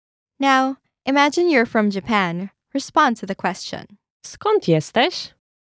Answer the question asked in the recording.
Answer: Jestem z Japonii.